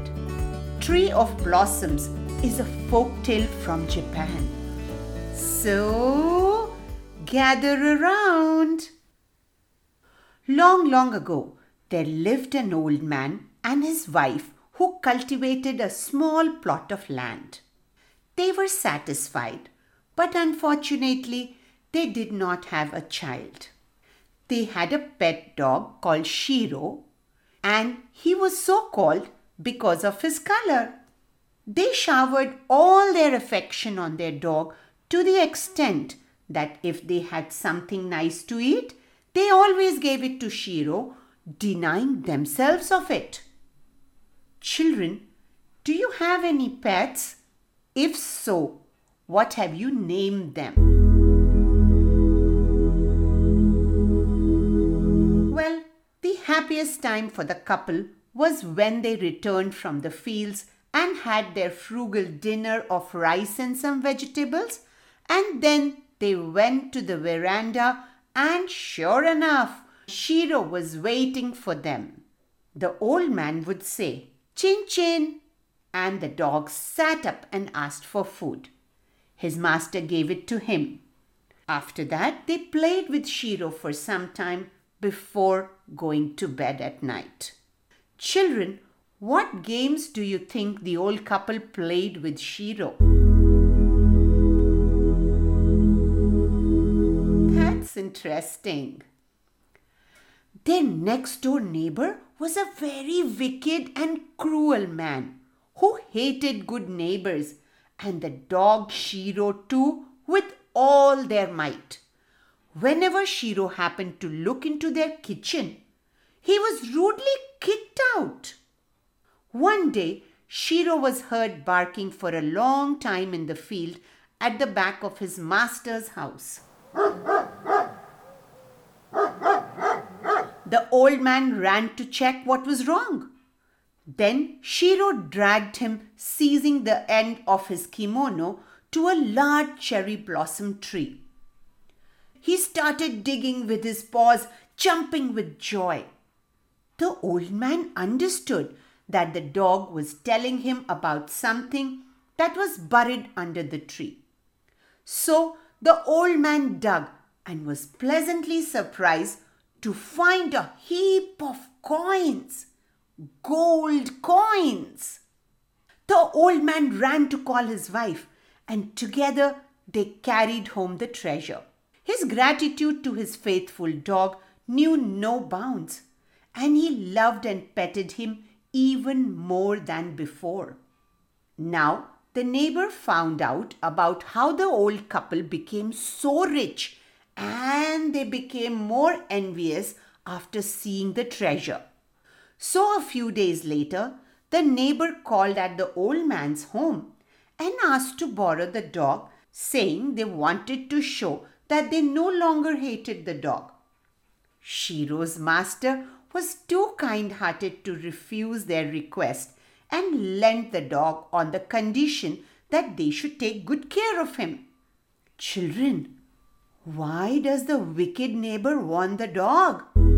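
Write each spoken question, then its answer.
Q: Children, why does the wicked neighbor want the dog?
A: He hoped the dog would find treasure for him too, like it had for the old man.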